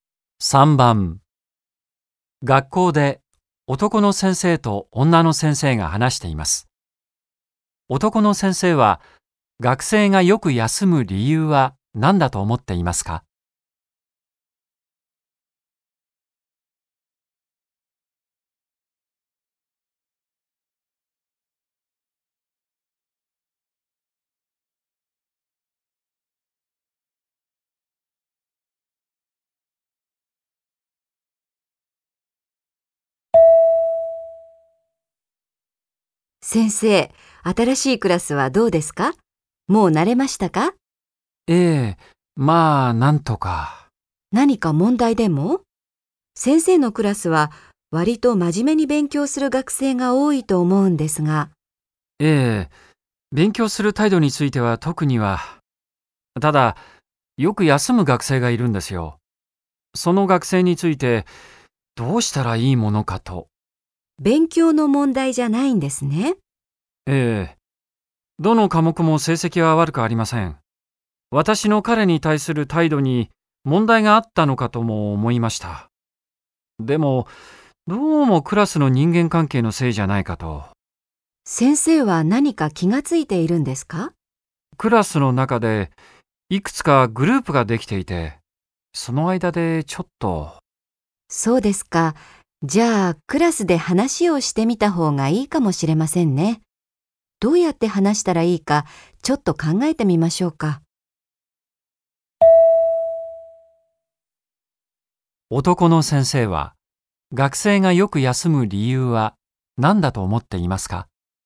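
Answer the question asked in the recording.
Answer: クラスの人間関係(グループ間の問題)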